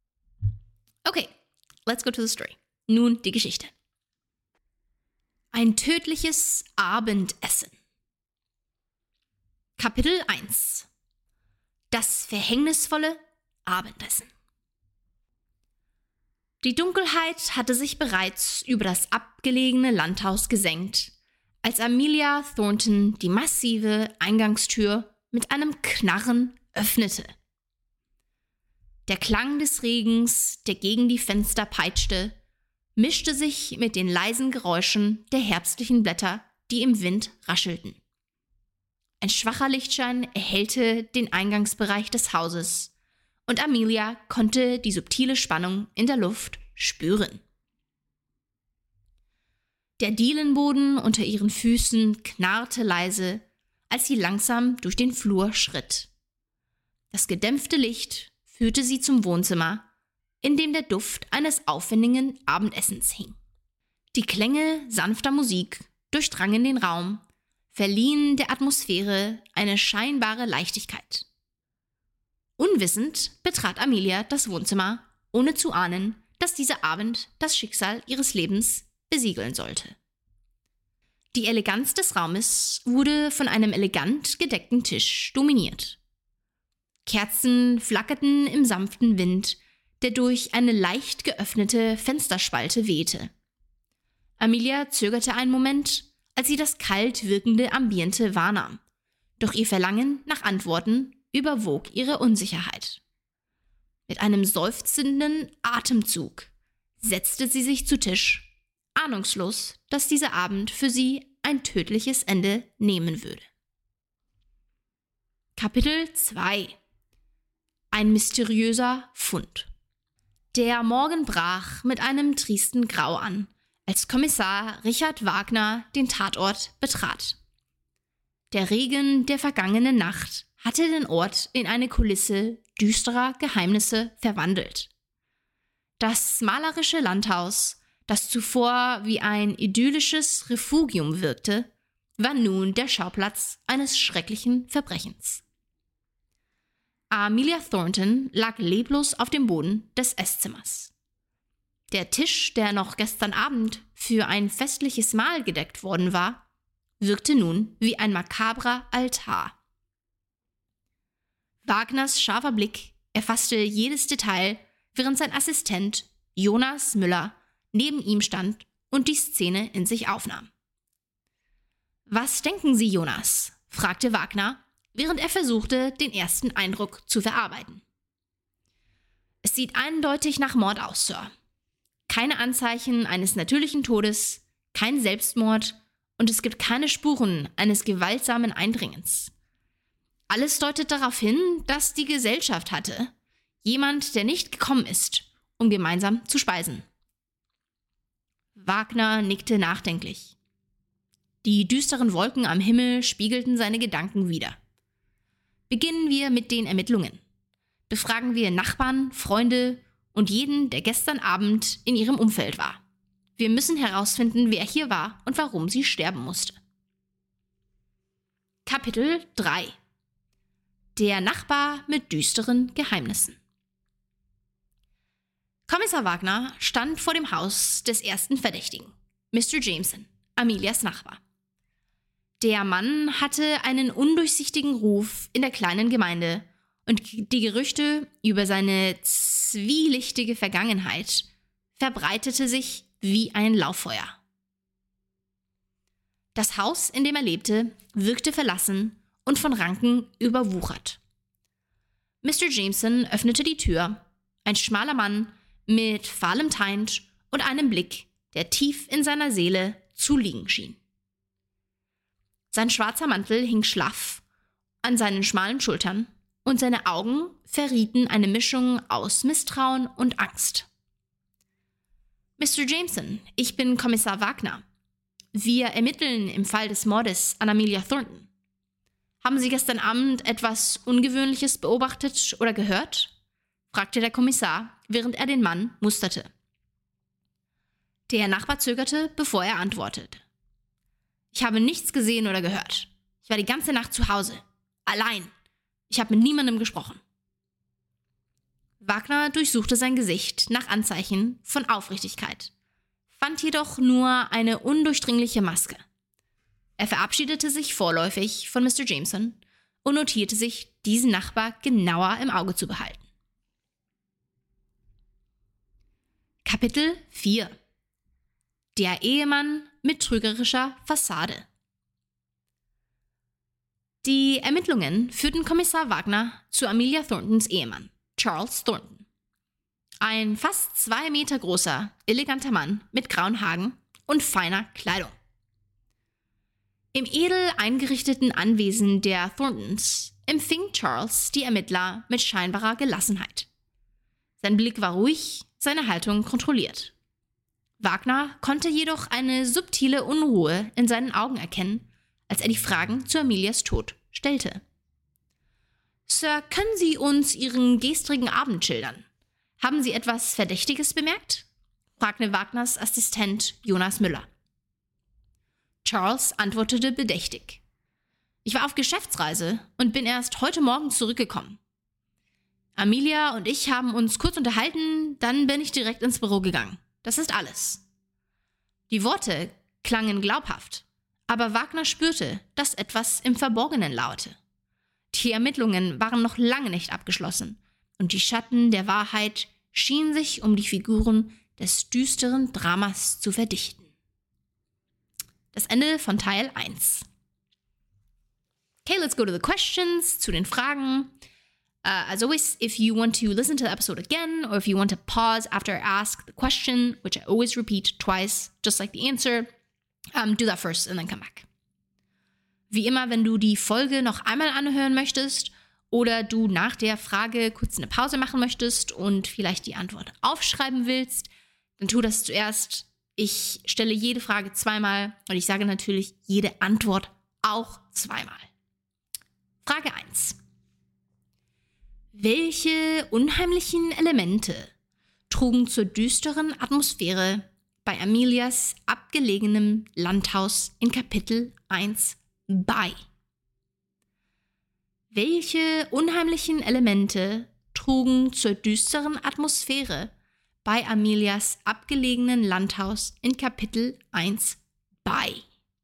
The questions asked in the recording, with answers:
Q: Welche unheimlichen Elemente trugen zur düsteren Atmosphäre bei Amelias abgelegenem Landhaus in Kapitel 1 bei?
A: Die Dunkelheit, das peitschende Regengeräusch, der knarrende Dielenboden, der sanfte Lichtschein und der aufwendig gedeckte Tisch mit flackernden Kerzen trugen zu der düsteren Atmosphäre bei.